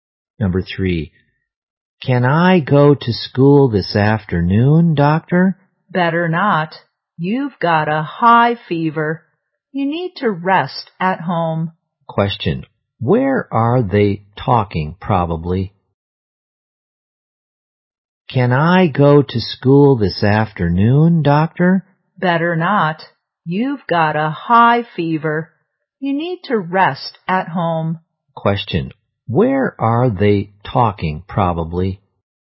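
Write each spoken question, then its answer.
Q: Question. Where are they talking, probably?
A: In a hospital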